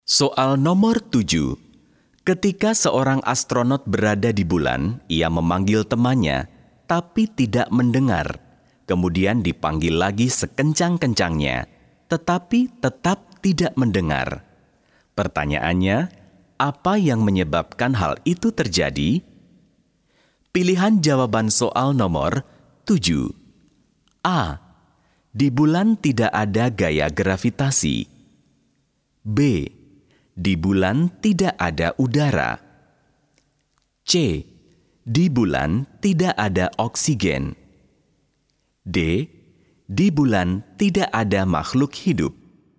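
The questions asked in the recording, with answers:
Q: Pertanyaannya, apa yang menyebabkan hal itu terjadi?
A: B: Di bulan tidak ada udara.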